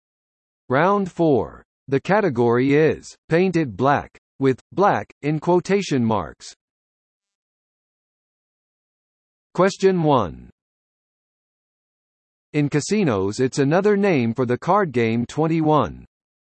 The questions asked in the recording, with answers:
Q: In casinos, it's another name for the card game 21.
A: Blackjack.